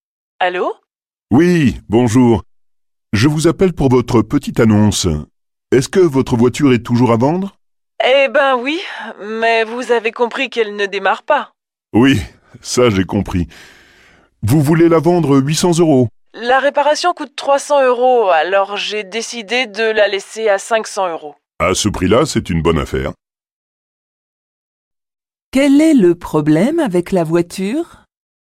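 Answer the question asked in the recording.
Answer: Elle ne démarre pas.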